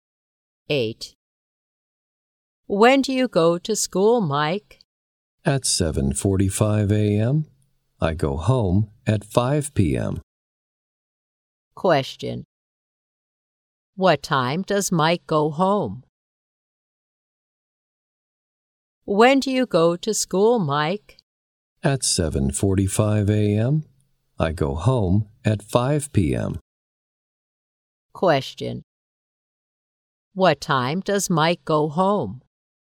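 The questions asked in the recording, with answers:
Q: What time does Mike go home?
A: At 5 p.m.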